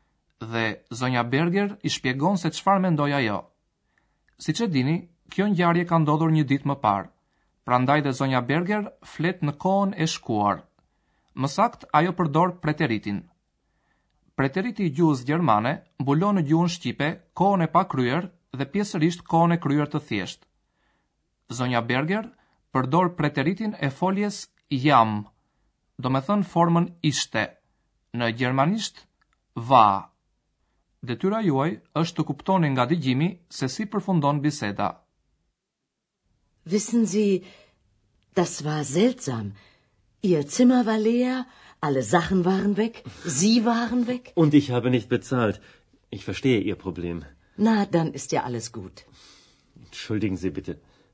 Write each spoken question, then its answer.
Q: detyra juaj është të kuptoni nga digjimi se si përfundon biseda.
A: Ndoshta e kuptuat që Zoti Majer tha se është i gatshëm të paguajë.